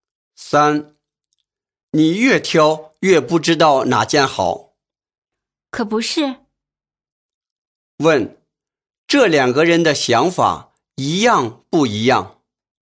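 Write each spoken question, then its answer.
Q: 问,这两个人的想法一样不一样?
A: 一样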